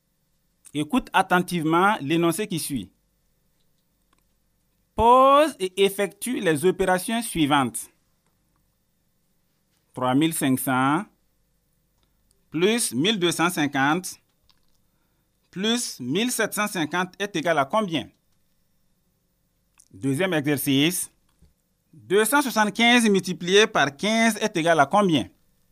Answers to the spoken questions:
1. 3500 plus 1250 plus 1750 est égal à 6500.
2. 15 est égal à 4125.